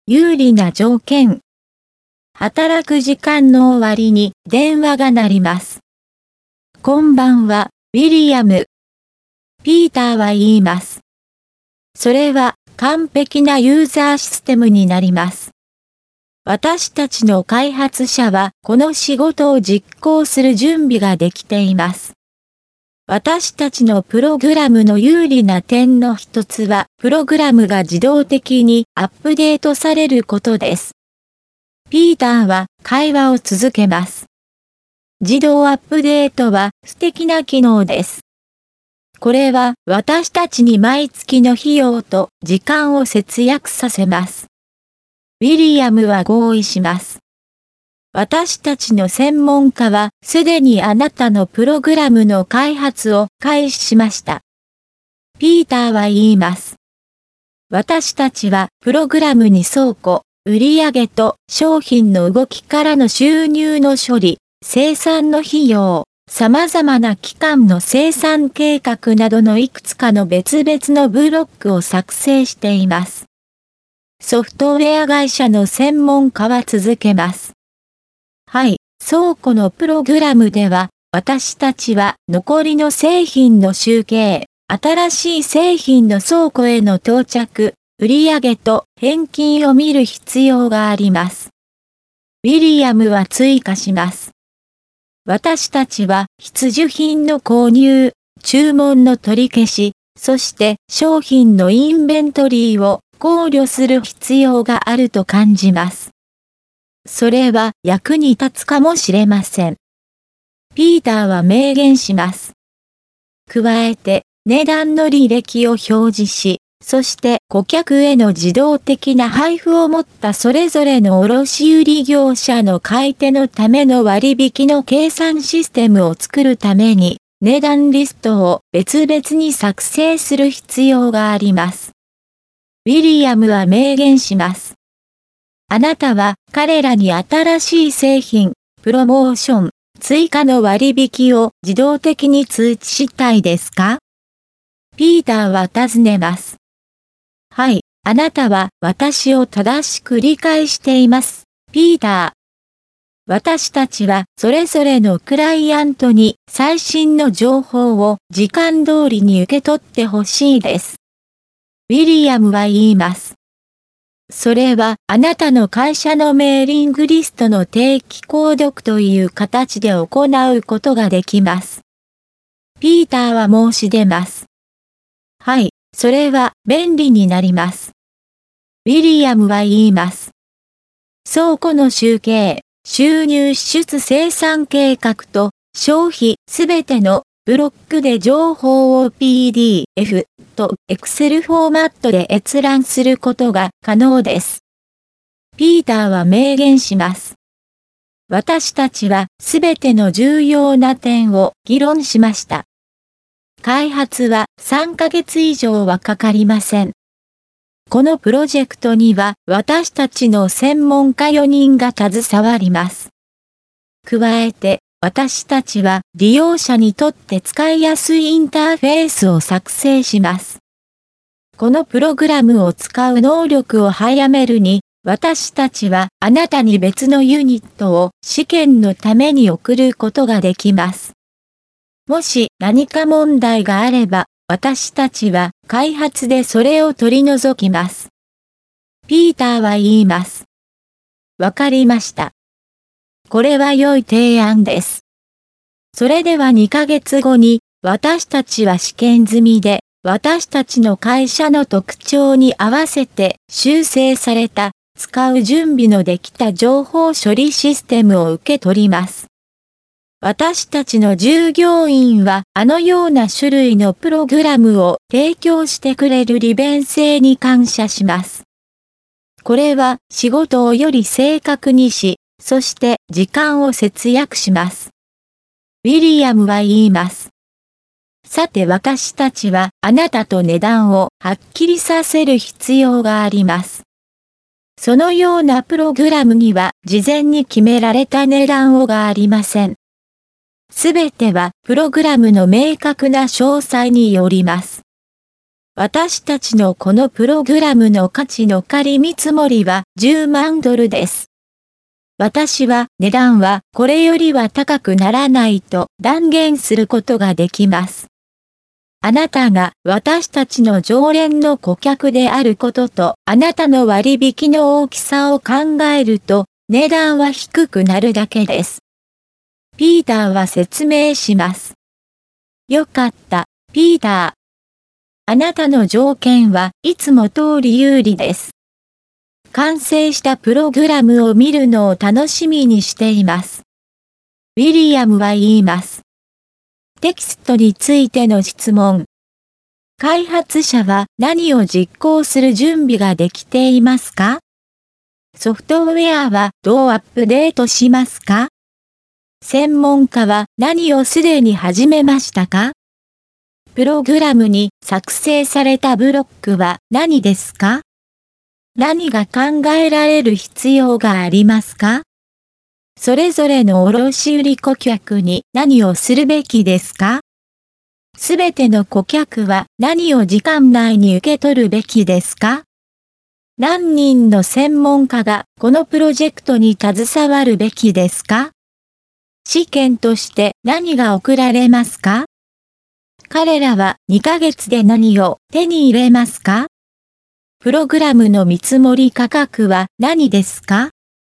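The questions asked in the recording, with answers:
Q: 開発者は何を実行する準備ができていますか?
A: この仕事(ユーザーシステムの開発)

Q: ソフトウェアはどうアップデートしますか?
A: 自動的に

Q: 専門家は何をすでに始めましたか?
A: プログラムの開発

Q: プログラムに作成されたブロックは何ですか?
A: 倉庫、売上と商品の動きからの収入の処理、生産の費用、様々な期間の生産計画

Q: 何が考えられる必要がありますか?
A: 必需品の購入、注文の取り消し、商品のインベントリー

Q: すべての顧客は何を時間内に受け取るべきですか?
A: 最新の情報

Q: 何人の専門家がこのプロジェクトに携わるべきですか?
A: 4人

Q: 試験として何が送られますか?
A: 別のユニット

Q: 彼らは2ヶ月で何を手に入れますか?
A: 試験済みで修正された、使う準備のできた情報処理システム

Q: プログラムの見積もり価格は何ですか?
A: 10万ドル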